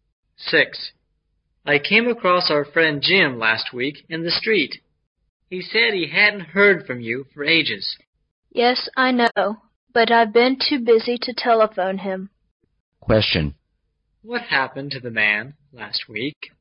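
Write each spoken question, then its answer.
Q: What happened to the man last week?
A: He came across his friend Jim in the street.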